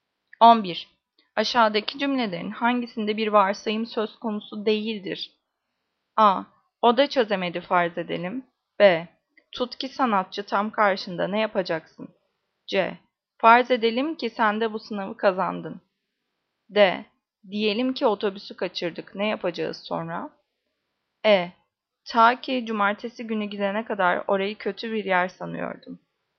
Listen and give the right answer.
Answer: Cevap E. Ta ki cumartesi günü gidene kadar orayı kötü bir yer sanıyordum.